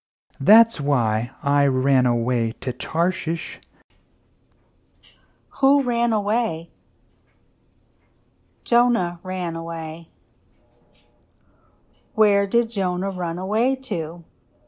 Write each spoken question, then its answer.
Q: Where did Jonah run away to?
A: Jonah ran away to Tarshish.